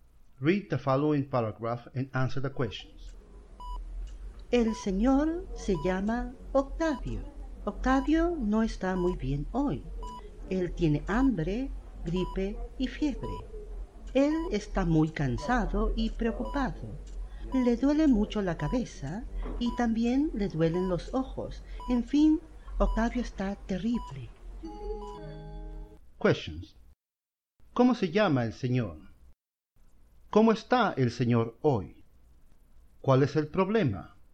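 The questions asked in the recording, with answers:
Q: ¿Cómo se llama el señor?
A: Se llama Octavio.

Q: ¿Cómo está el señor hoy?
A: Está terrible; no está muy bien.

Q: ¿Cuál es el problema?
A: Tiene hambre, gripe y fiebre, está cansado y preocupado, y le duelen la cabeza y los ojos.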